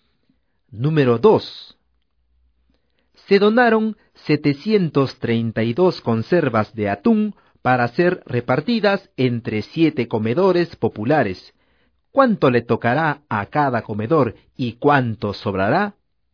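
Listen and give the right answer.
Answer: 104 conservas a cada comedor y sobran 4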